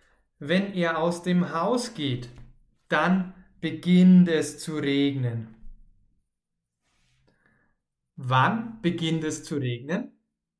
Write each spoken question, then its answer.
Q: Wann beginnt es zu regnen?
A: Wenn er aus dem Haus geht.